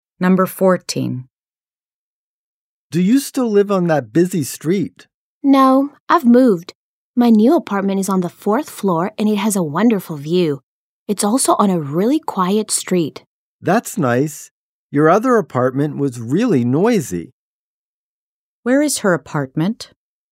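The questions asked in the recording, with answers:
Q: Where is her apartment?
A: On the fourth floor, on a quiet street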